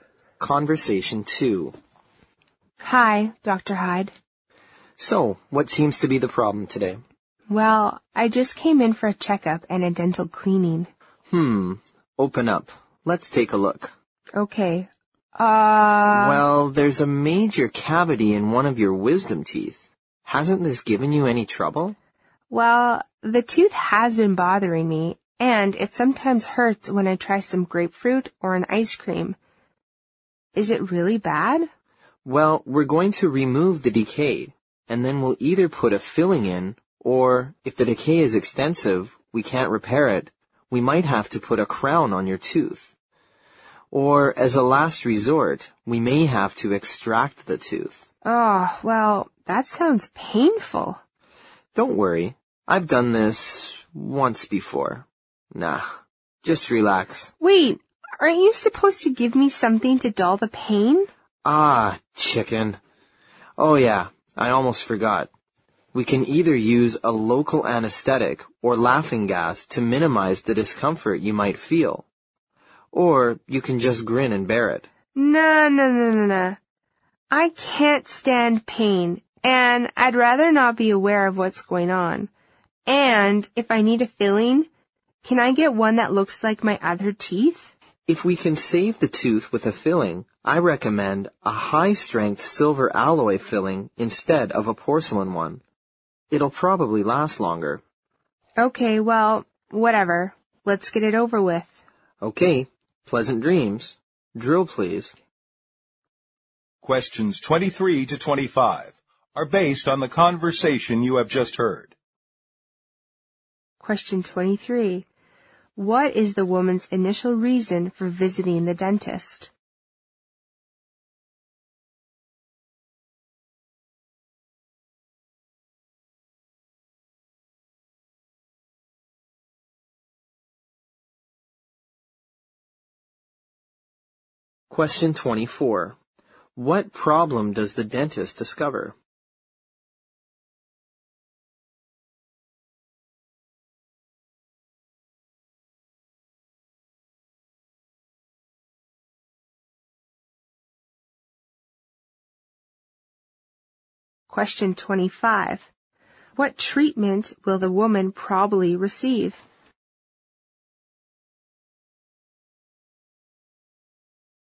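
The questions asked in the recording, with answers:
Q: What is the woman's initial reason for visiting the dentist?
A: For a checkup and a dental cleaning

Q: What problem does the dentist discover?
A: A major cavity in one of her wisdom teeth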